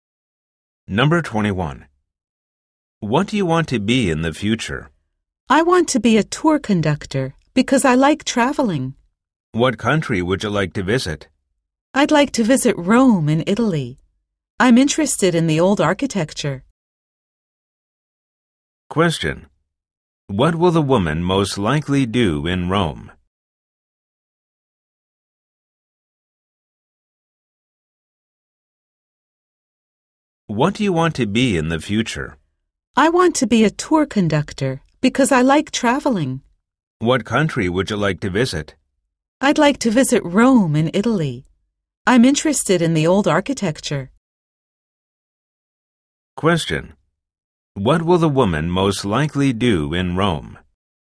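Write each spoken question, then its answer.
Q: What will the woman most likely do in Rome?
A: Look at the old architecture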